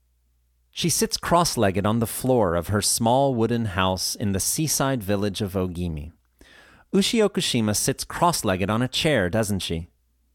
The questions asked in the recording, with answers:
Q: Ushi Okushima sits cross-legged on a chair, doesn't she?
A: No, she doesn't sit on a chair, but rather she sits cross-legged on the floor.